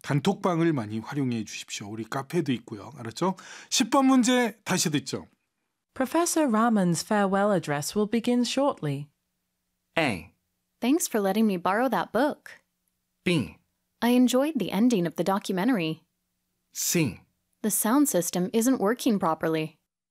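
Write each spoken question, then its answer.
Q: Professor Rahman's farewell address will begin shortly.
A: C: The sound system isn't working properly.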